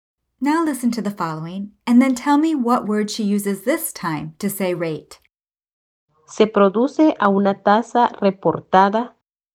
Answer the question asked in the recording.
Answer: La tasa.